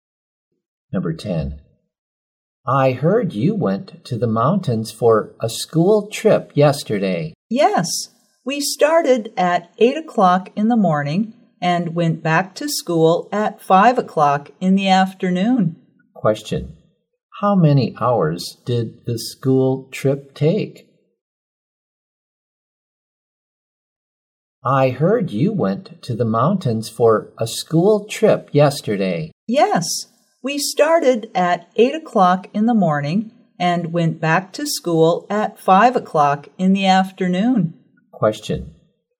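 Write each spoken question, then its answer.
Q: Question. How many hours did the school trip take?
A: Nine hours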